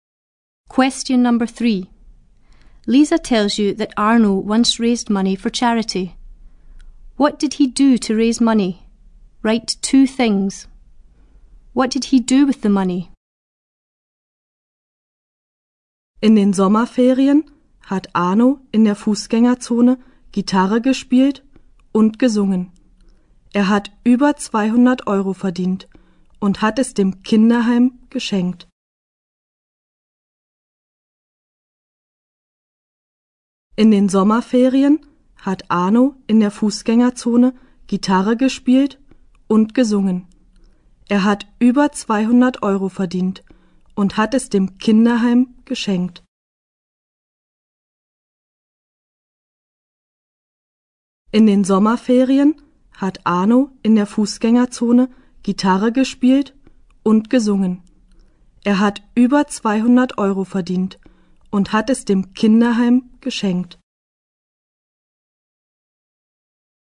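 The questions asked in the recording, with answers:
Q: What did he do to raise money?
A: He played guitar and sang in the pedestrian zone

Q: What did he do with the money?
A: He gave it (over 200 euros) to a children's home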